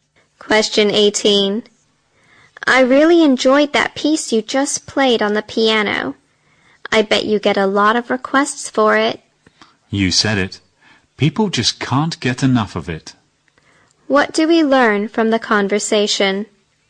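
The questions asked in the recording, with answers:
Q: What do we learn from the conversation?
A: The piano piece is very popular.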